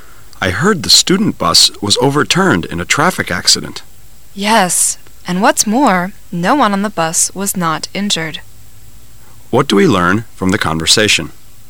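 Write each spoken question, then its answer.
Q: What do we learn from the conversation?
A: Everyone on the student bus was injured in the accident.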